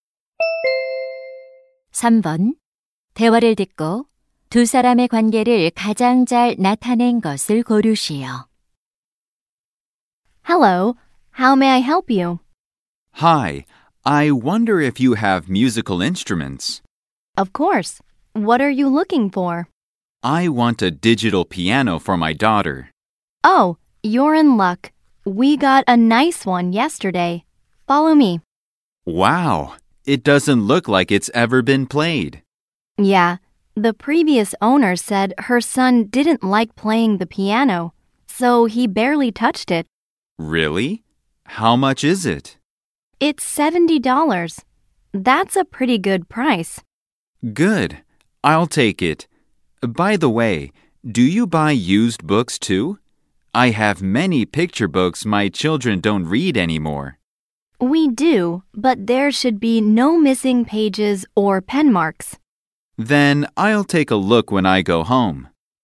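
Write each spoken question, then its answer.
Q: 대화를 듣고 두 사람의 관계를 가장 잘 나타낸 것을 고르시오.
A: 중고 물품 가게 점원 - 손님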